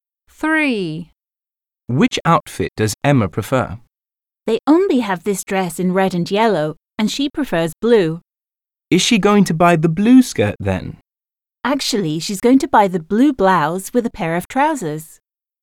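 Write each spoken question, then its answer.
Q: Which outfit does Emma prefer?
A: The blue blouse with a pair of trousers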